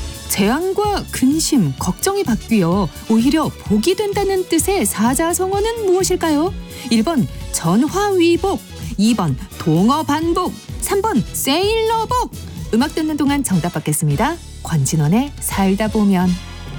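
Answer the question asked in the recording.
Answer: 1번: 전화위복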